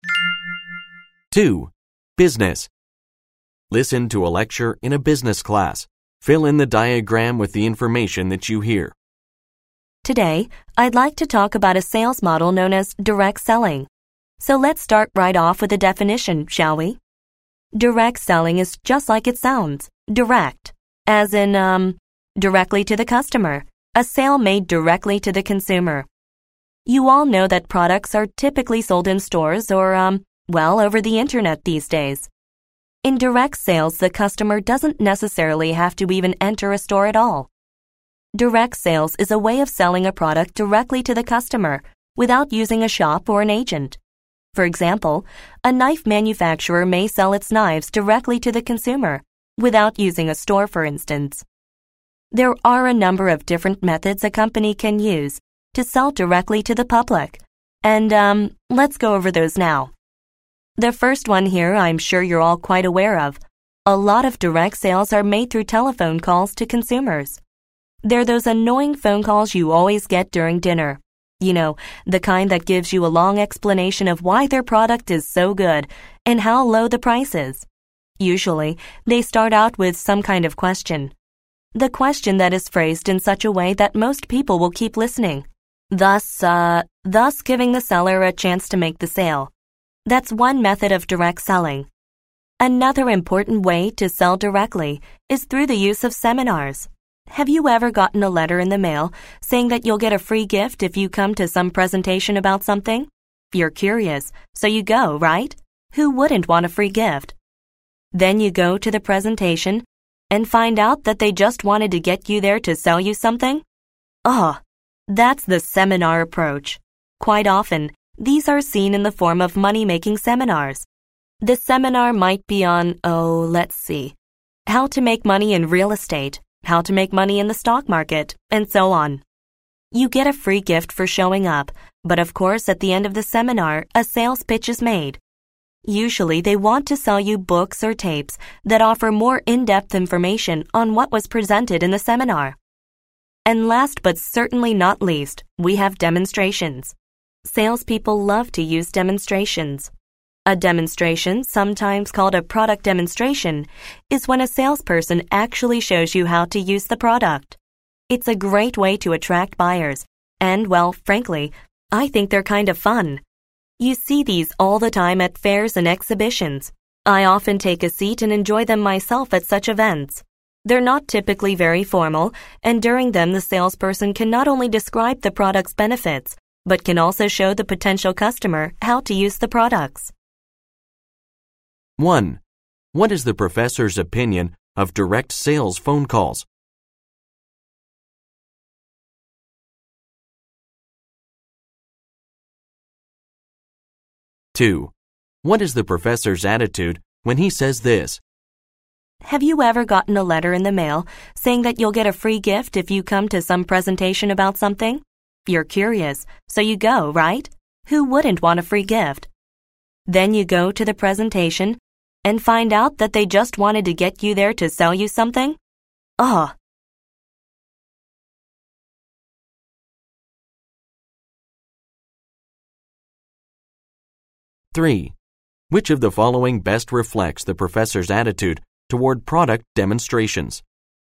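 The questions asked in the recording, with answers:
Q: What is the professor's opinion of direct sales phone calls?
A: He finds them annoying.

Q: What is the professor's attitude when he says this?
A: He is annoyed by seminars that just lure you in with a free gift to sell you something.

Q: Which of the following best reflects the professor's attitude toward product demonstrations?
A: He likes them and finds them fun.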